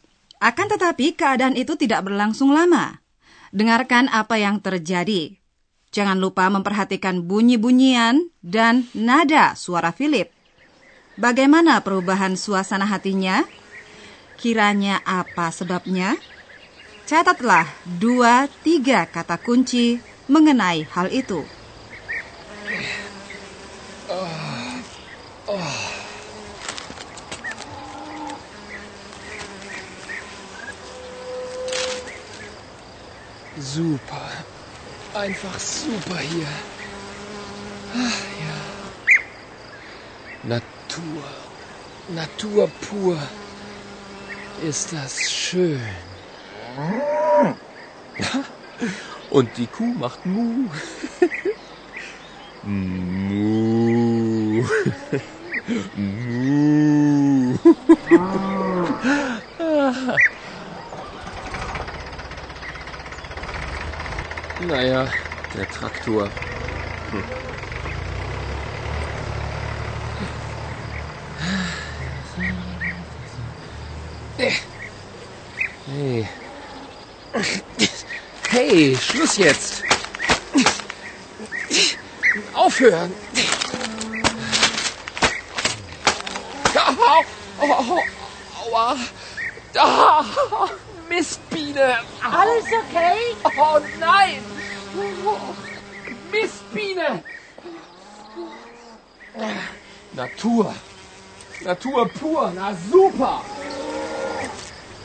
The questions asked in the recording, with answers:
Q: Bagaimana perubahan suasana hatinya?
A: Ketika Philip digigit lebah, suasana hatinya langsung berubah.